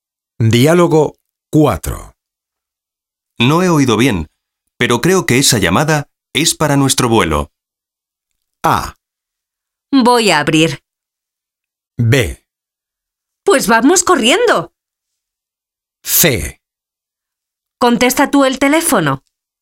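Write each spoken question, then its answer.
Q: No he oído bien, pero creo que esa llamada es para nuestro vuelo.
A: B: Pues vamos corriendo.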